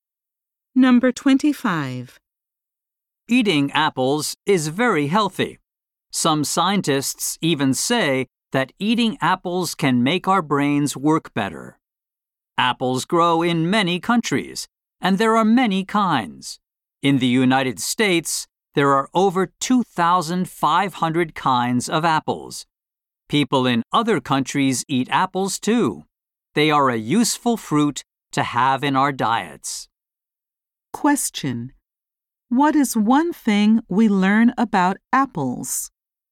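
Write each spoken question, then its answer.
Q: What is one thing we learn about apples?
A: There are over 2,500 kinds in the United States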